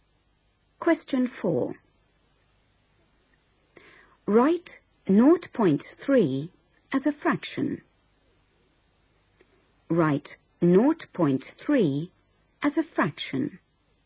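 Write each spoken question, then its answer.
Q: Write 0.3 as a fraction.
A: 3/10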